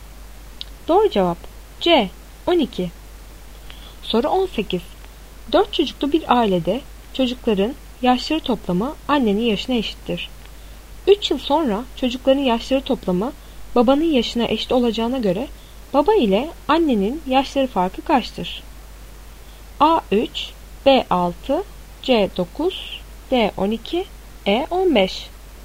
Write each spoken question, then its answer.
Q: 3 yıl sonra çocukların yaşları toplamı babanın yaşına eşit olacağına göre baba ile annenin yaşları farkı kaçtır?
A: Doğru cevap C 9.